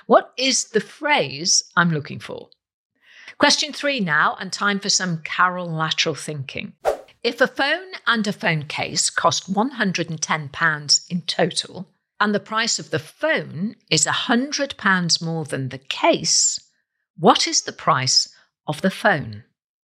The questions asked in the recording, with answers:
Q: If a phone and a phone case cost £110 in total, and the price of the phone is £100 more than the case, what is the price of the phone?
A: And the answer is the phone would cost £105.